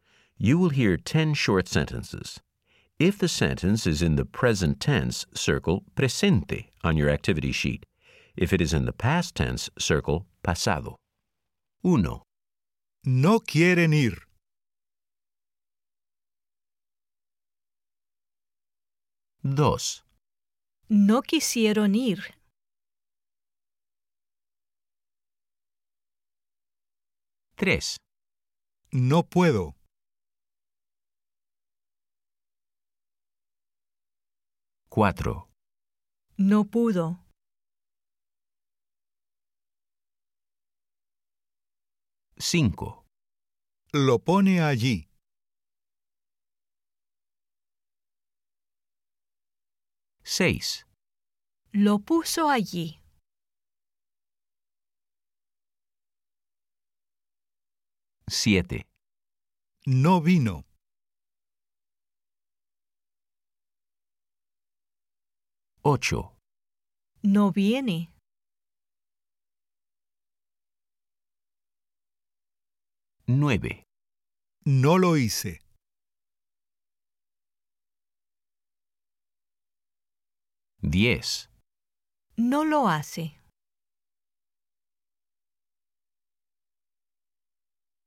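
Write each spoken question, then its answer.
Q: No quieren ir.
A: presente

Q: No quisieron ir.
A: pasado

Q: No puedo.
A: presente

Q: No pudo.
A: pasado

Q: Lo pone allí.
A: presente

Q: Lo puso allí.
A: pasado

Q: No vino.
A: pasado

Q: No viene.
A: presente

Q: No lo hice.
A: pasado

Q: No lo hace.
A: presente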